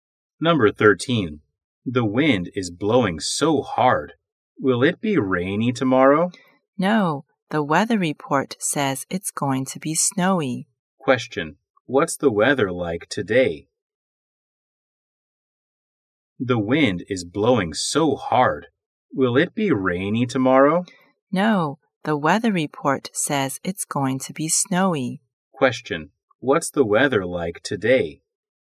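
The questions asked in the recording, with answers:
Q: What's the weather like today?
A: Windy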